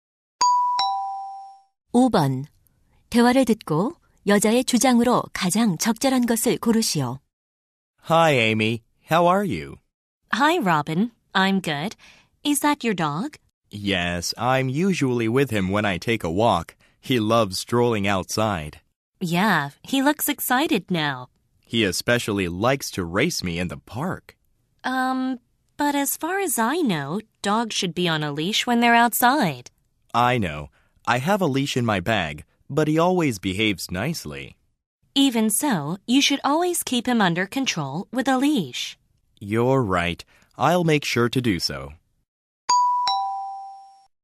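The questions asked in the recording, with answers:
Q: 대화를 듣고 여자의 주장으로 가장 적절한 것을 고르시오.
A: 개를 밖에 데리고 나갈 때는 항상 목줄을 채워야 한다.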